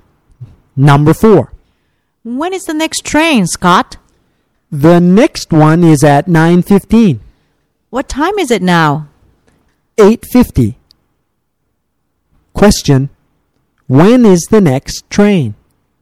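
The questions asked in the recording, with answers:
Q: when is the next train?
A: At 9:15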